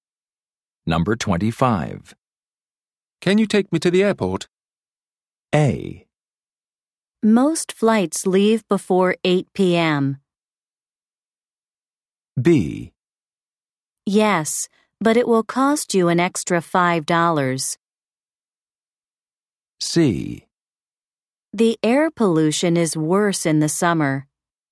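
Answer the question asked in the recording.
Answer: B: Yes, but it will cost you an extra $5.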